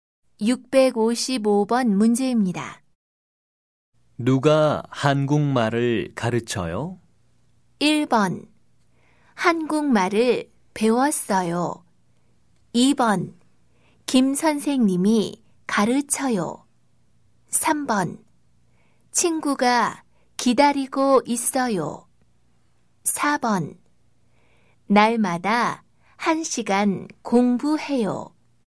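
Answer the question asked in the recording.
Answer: 2: 김선생님이 가르쳐요.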